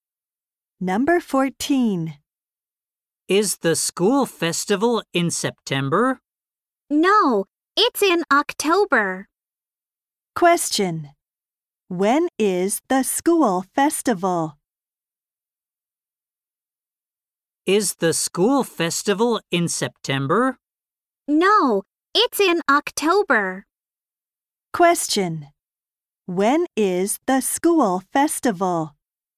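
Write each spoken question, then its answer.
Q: When is the school festival?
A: In October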